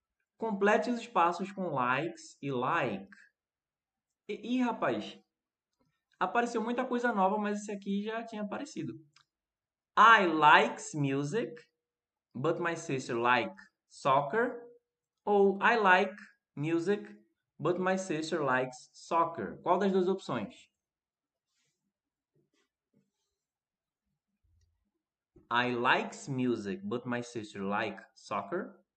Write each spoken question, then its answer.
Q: Qual das duas opções?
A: like, depois likes